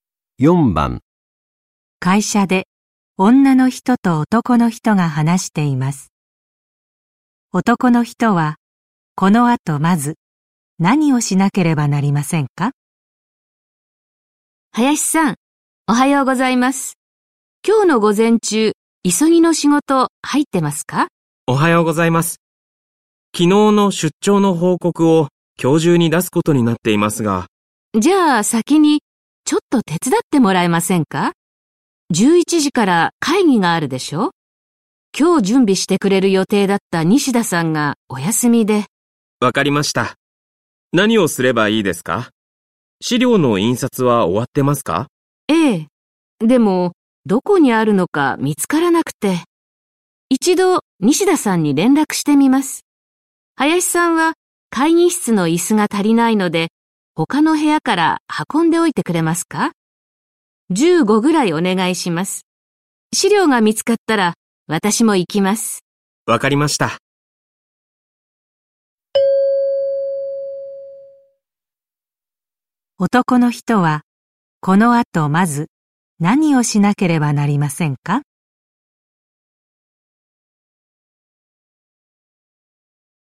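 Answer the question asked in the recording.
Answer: 他の部屋から会議室に椅子を運ぶ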